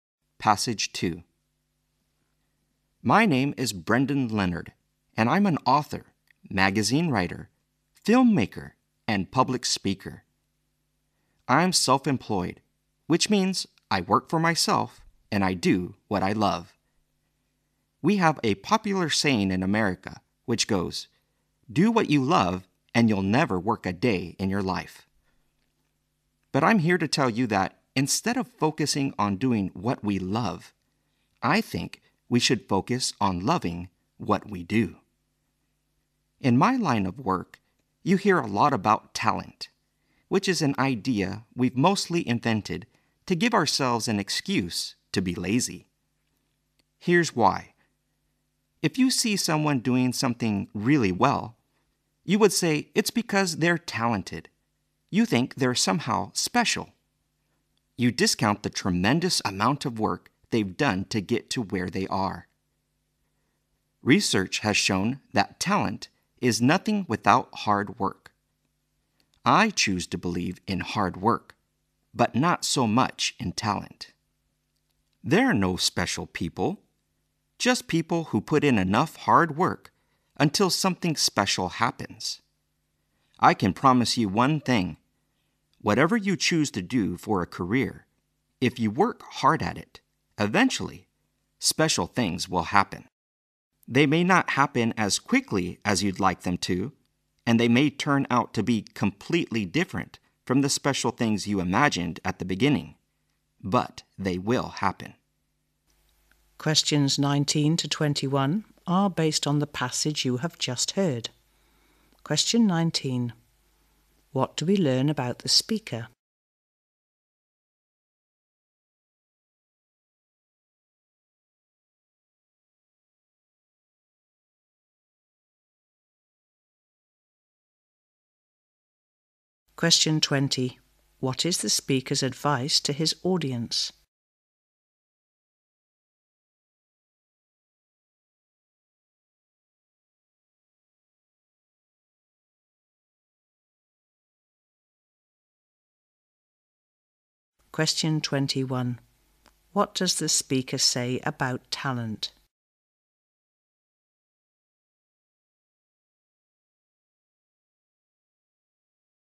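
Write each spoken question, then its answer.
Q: What is the speaker's advice to his audience?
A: Love what you do

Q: What does the speaker say about talent?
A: It is nothing without hard work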